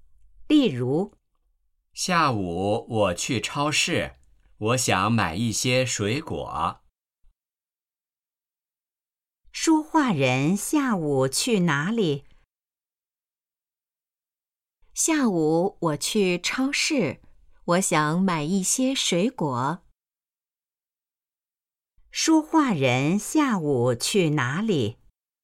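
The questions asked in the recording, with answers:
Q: 说话人下午去哪里?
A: 超市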